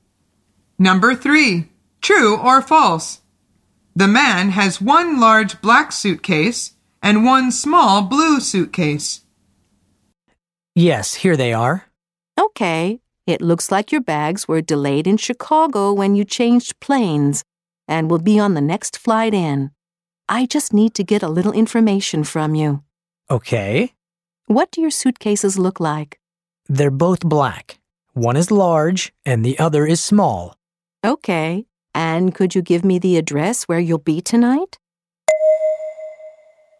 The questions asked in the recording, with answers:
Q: True or false? The man has one large black suitcase and one small blue suitcase.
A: The answer is false.